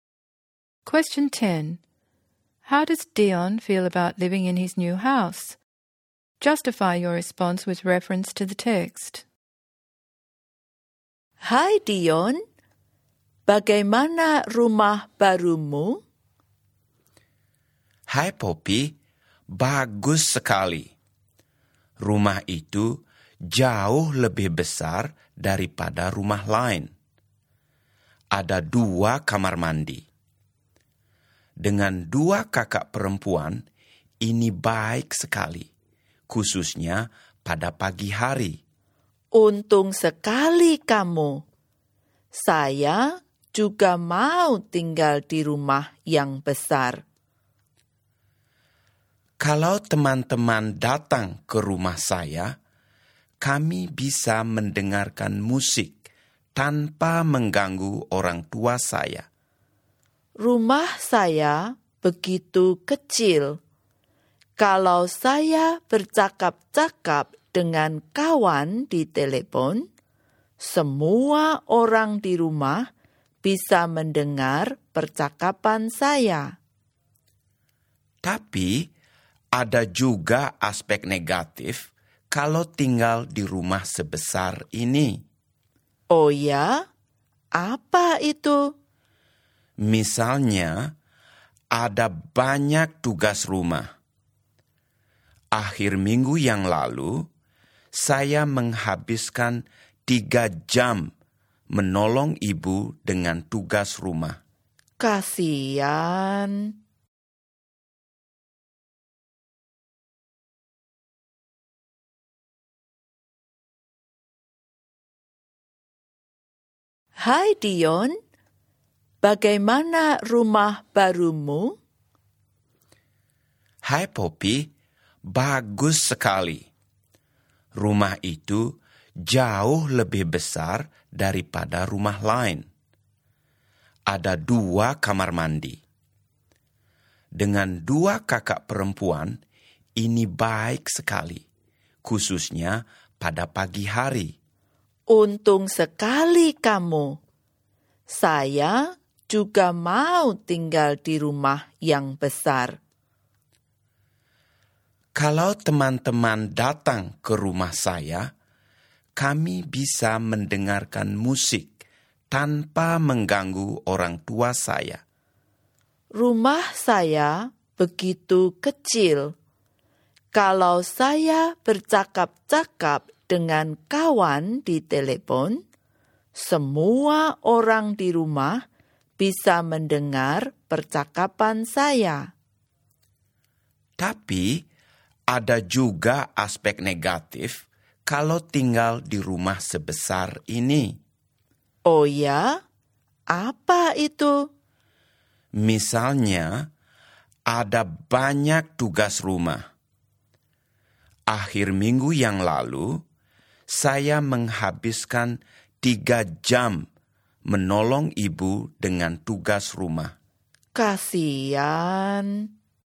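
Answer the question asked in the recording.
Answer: Mostly happy: it is bigger, has two bathrooms and he can play music without disturbing his parents, but there are lots of household chores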